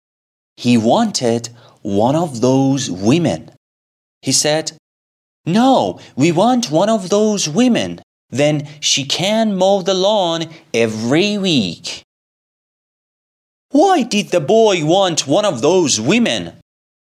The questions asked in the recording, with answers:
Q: Why did the boy want one of those women?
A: Because she could mow the lawn every week.